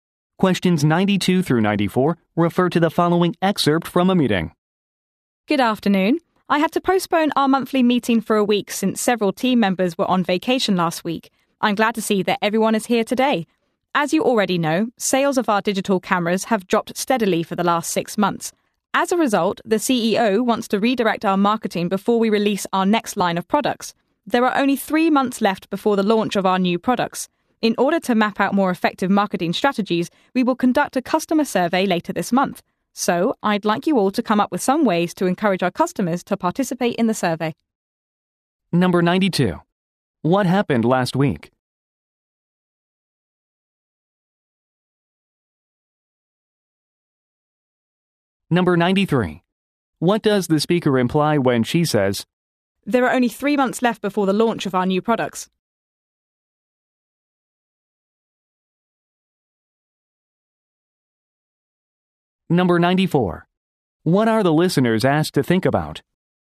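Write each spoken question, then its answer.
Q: What happened last week?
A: Several team members were on vacation, so the meeting was postponed

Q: What are the listeners asked to think about?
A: Ways to encourage customers to take part in the survey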